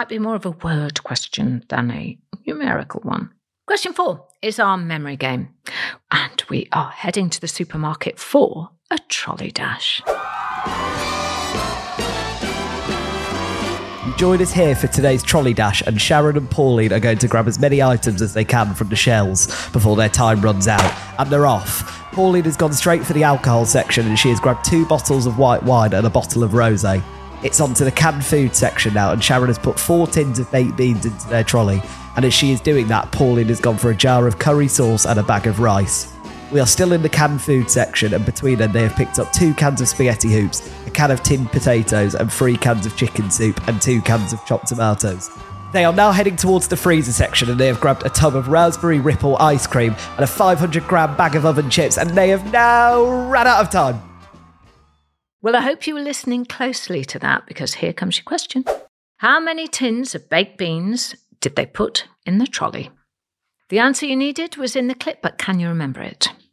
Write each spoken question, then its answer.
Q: How many tins of baked beans did they put in the trolley?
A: Well, they did manage to grab 4 tins of beans.